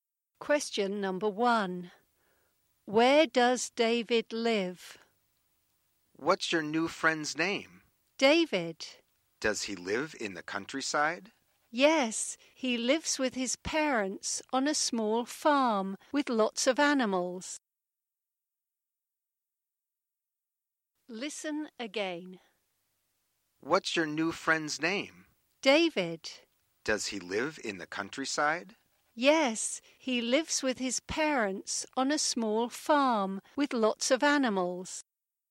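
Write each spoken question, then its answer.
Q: Where does David live?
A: On a small farm in the countryside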